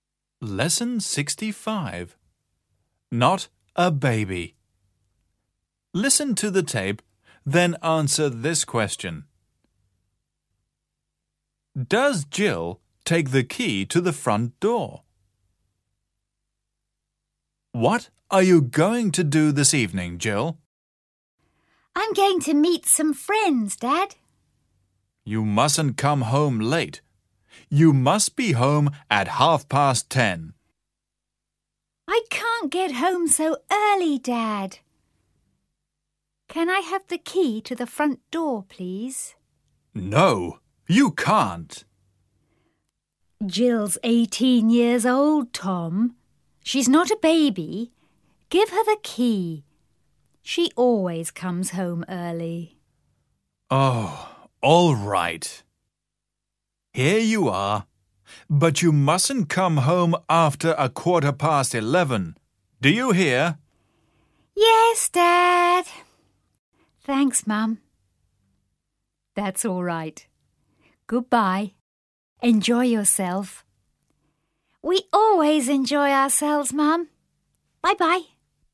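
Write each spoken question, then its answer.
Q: Does Jill take the key to the front door?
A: Yes, she does.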